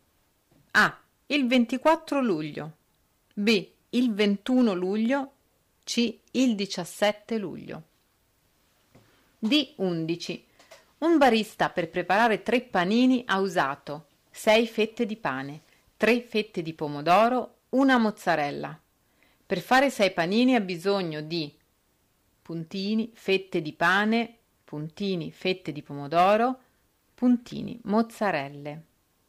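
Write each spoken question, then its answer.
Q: Per fare 6 panini ha bisogno di puntini, fette di pane, puntini, fette di pomodoro, puntini, mozzarelle.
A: 12 fette di pane, 6 fette di pomodoro, 2 mozzarelle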